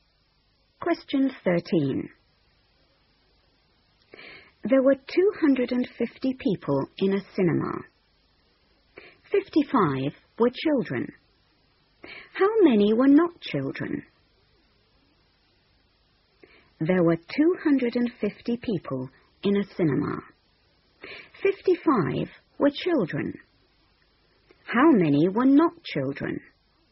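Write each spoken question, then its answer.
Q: 55 were children. How many were not children?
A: 195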